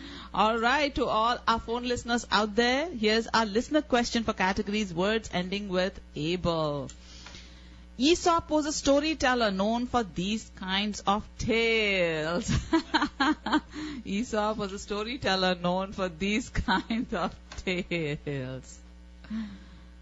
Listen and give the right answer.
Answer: Yes, Aesop's fables.